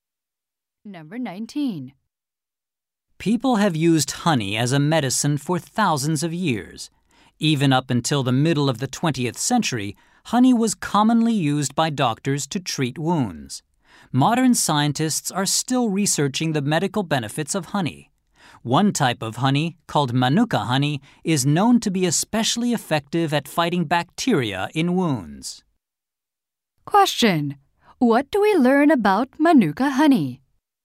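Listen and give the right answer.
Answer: It is especially good at fighting bacteria in wounds.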